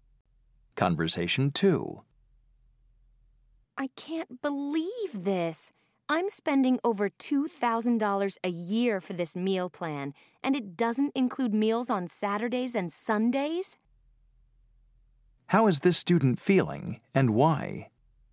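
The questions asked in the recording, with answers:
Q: How is this student feeling, and why?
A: Upset, because the expensive meal plan doesn't cover weekend meals.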